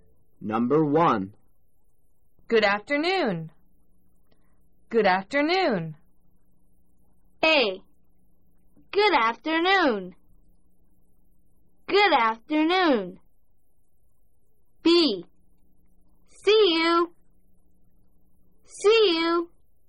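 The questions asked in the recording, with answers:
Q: Good afternoon. Good afternoon.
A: A: Good afternoon.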